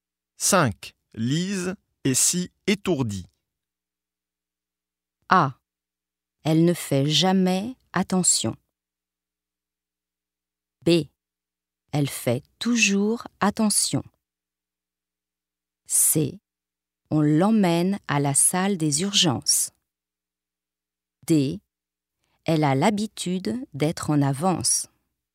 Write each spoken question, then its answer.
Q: Lise est si étourdie.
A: A. Elle ne fait jamais attention.